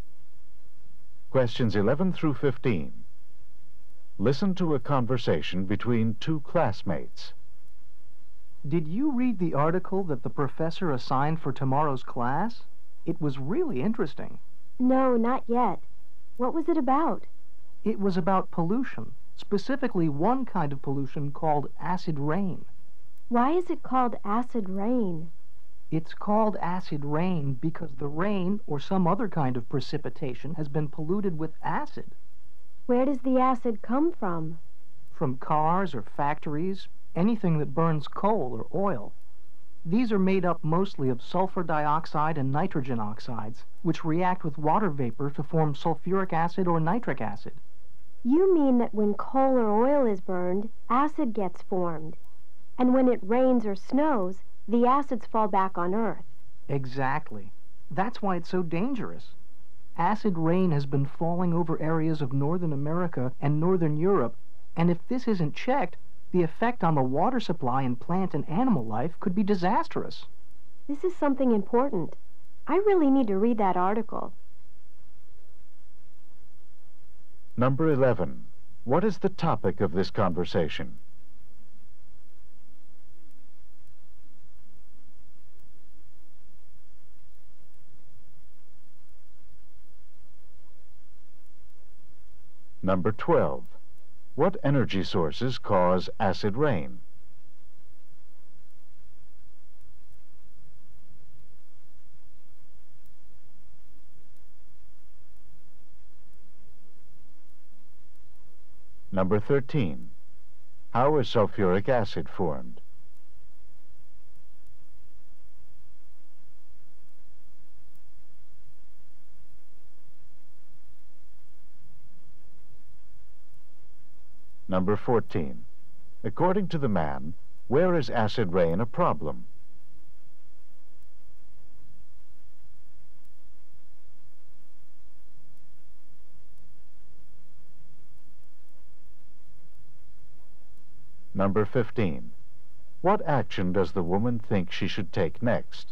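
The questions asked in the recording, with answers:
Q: What is the topic of this conversation?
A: Acid rain.

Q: What energy sources cause acid rain?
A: Coal and oil.

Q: How is sulfuric acid formed?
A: Sulfur dioxide reacts with water vapor.

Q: According to the man, where is acid rain a problem?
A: Northern America and Northern Europe.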